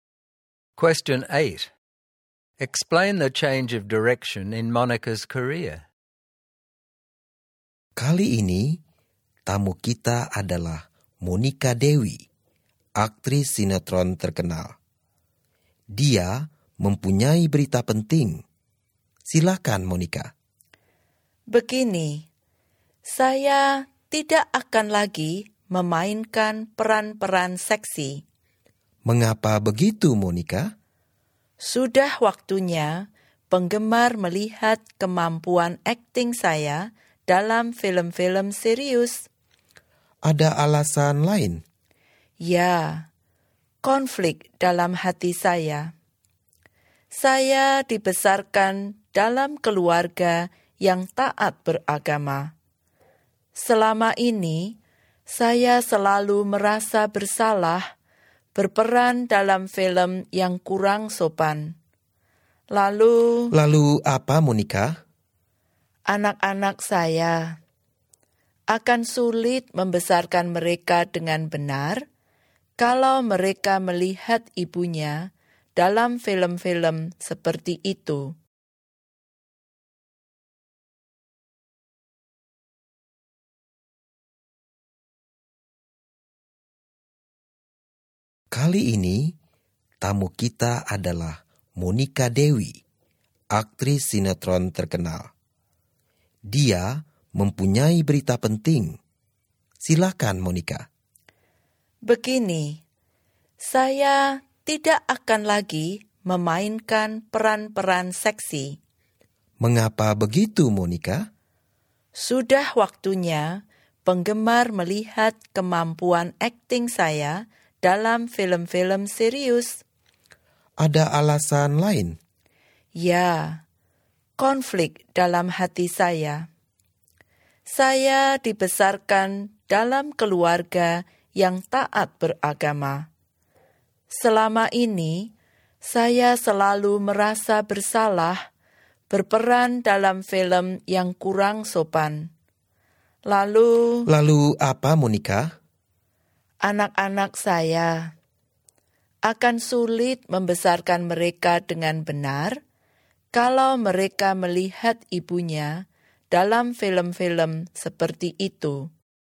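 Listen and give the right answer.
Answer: She will stop playing sexy roles and move to serious films to show her acting ability. She also felt guilty because of her religious upbringing, and she worries about raising her children properly if they see her in such films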